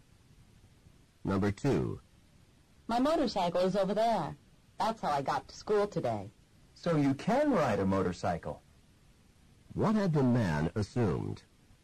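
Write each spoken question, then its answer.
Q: What had the man assumed?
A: That the woman could not ride a motorcycle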